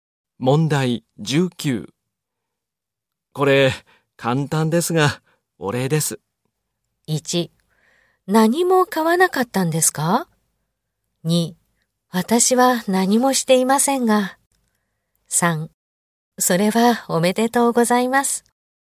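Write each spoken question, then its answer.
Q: これ、簡単ですが、お礼です。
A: 3: 私は何もしていませんが。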